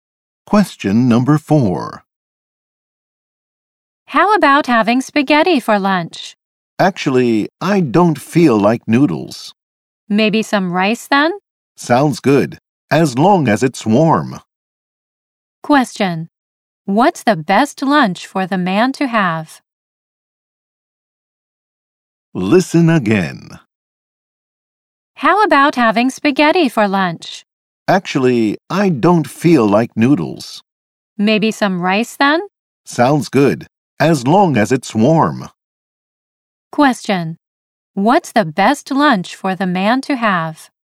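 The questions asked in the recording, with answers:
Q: What's the best lunch for the man to have?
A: A warm rice dish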